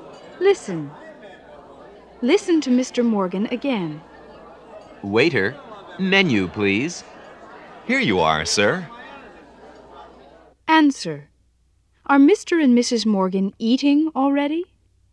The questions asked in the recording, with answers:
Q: Are Mr. and Mrs. Morgan eating already?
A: No, they're not.